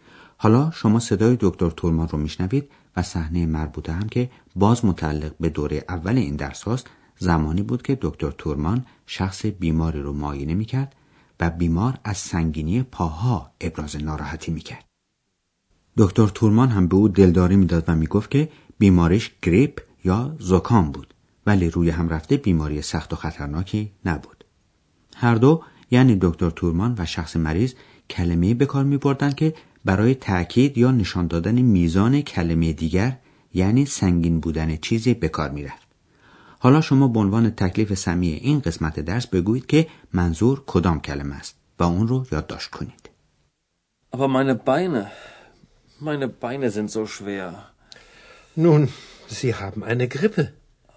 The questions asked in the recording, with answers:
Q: حالا شما به عنوان تکلیف سمی این قسمت درس بگویید که منظور کدام کلمه است و اون رو یادداشت کنید.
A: کلمه آخری هم کلمه زو بود که معنیش چنین یا چنان یا چندانه.